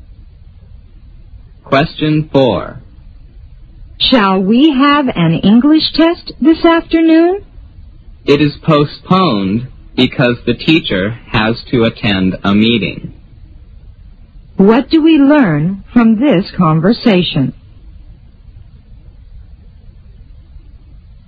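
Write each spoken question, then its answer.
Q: What do we learn from this conversation?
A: The English test has been postponed because the teacher has to attend a meeting.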